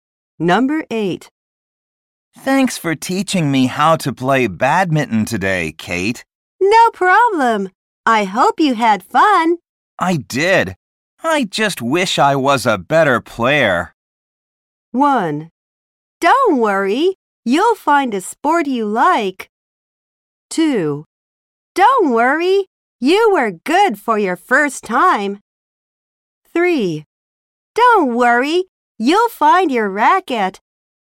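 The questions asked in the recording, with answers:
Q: I did. I just wish I was a better player.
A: 2: Don't worry. You were good for your first time.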